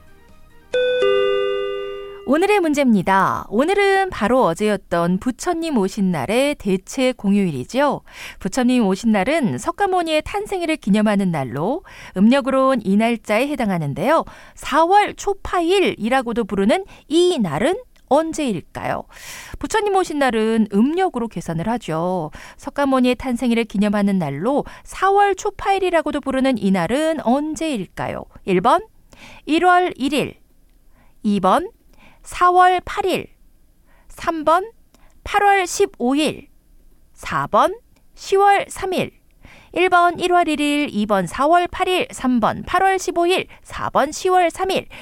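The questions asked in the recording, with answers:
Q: 4월 초파일이라고도 부르는 이 날은 언제일까요?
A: 2번: 4월 8일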